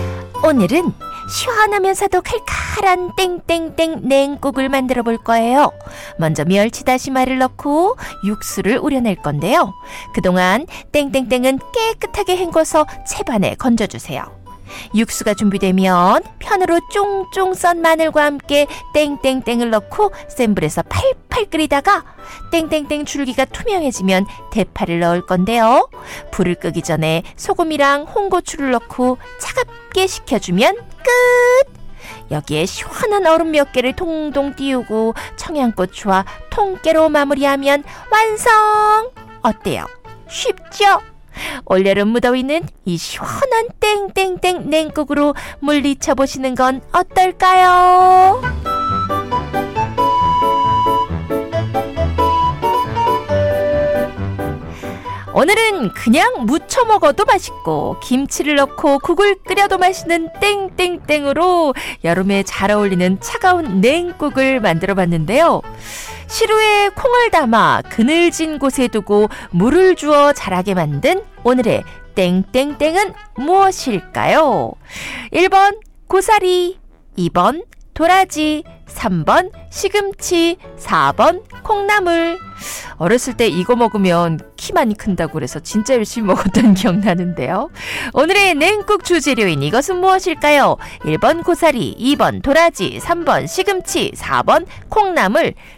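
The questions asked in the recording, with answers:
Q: 오늘의 냉국 주재료인 이것은 무엇일까요? 1번 고사리, 2번 도라지, 3번 시금치, 4번 콩나물.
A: 4번: 콩나물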